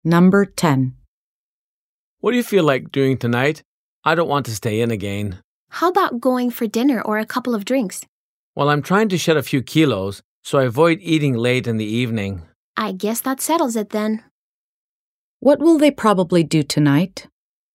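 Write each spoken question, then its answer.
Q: What will they probably do tonight?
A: Go out for a couple of drinks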